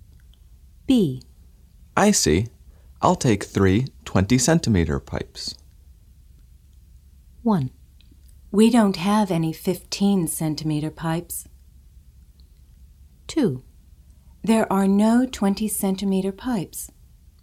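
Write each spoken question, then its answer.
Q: I see. I'll take 3 20-centimeter pipes.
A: 1: We don't have any 15-centimeter pipes.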